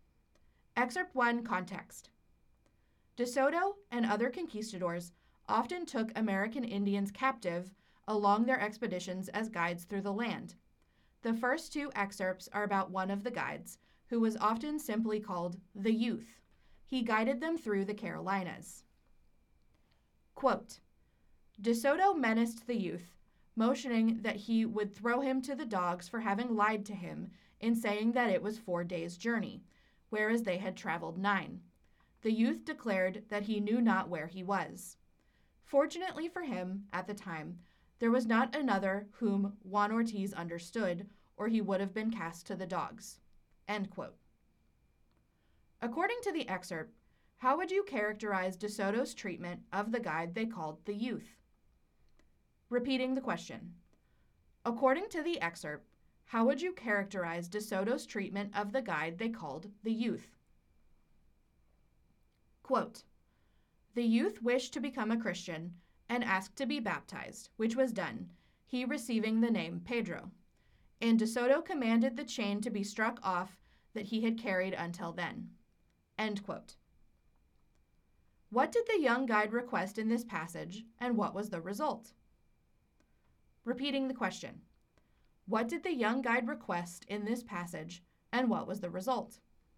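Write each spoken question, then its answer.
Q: According to the excerpt, how would you characterize De Soto's treatment of the guide they called the Youth?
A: Harsh and threatening: he threatened to throw him to the dogs for lying

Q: What did the young guide request in this passage, and what was the result?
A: He asked to be baptized; he was baptized as Pedro and his chain was removed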